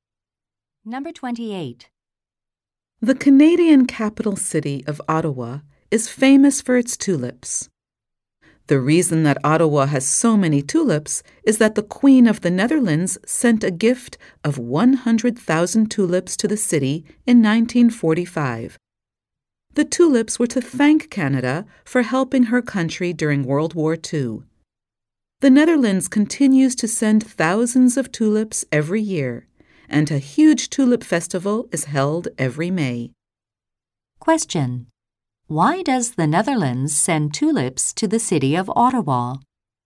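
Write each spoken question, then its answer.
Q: Why does the Netherlands send tulips to the city of Ottawa?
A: To thank Canada for helping during World War II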